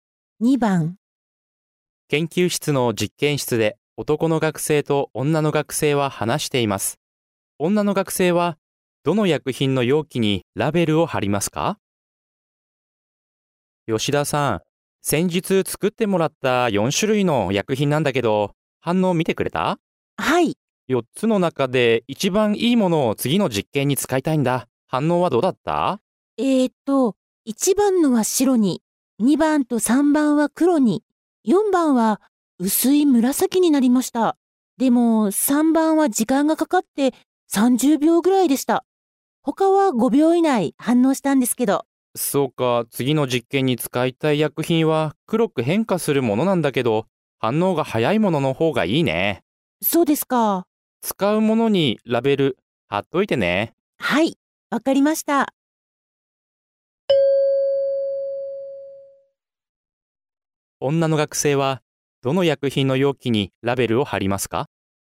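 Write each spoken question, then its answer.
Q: 女の学生はどの薬品の容器にラベルを貼りますか?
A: 2番の薬品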